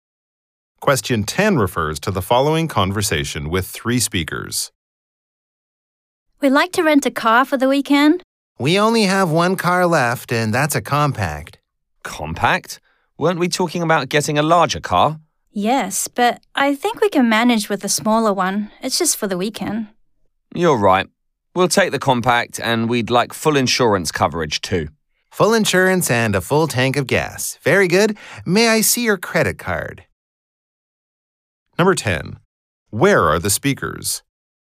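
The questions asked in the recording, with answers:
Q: Where are the speakers?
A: At a car rental agency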